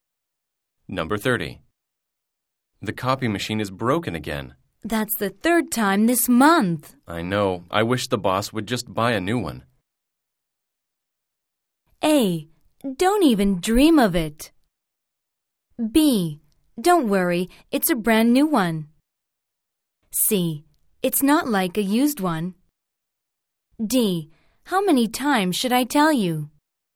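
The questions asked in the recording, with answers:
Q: I know. I wish the boss would just buy a new one.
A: A: Don't even dream of it.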